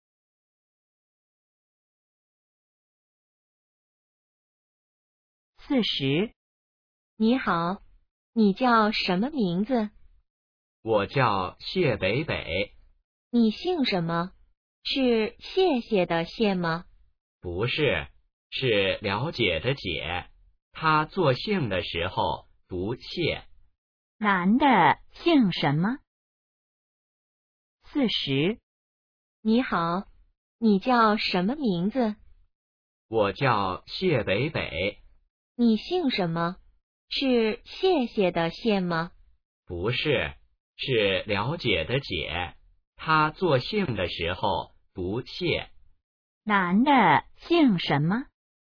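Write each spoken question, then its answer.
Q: 男的姓什么?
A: 解(读xiè)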